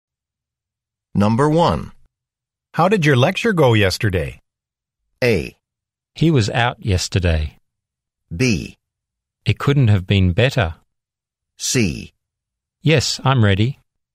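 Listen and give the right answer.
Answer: B: It couldn't have been better.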